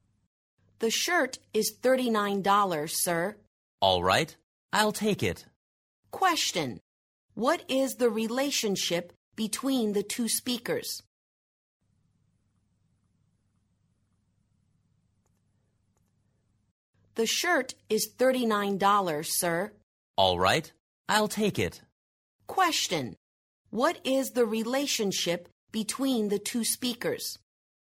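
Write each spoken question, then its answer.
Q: What is the relationship between the two speakers?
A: Shop assistant and customer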